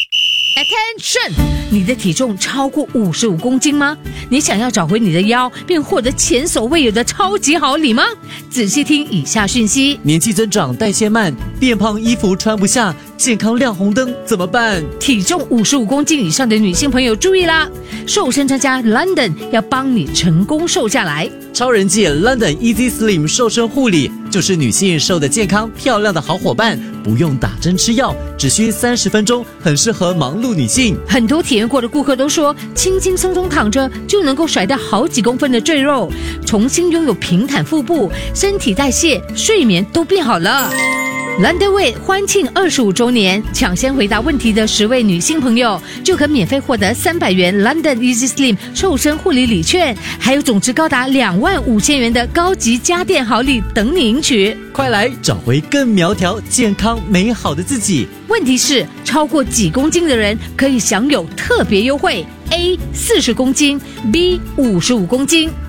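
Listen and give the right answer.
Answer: B: 55公斤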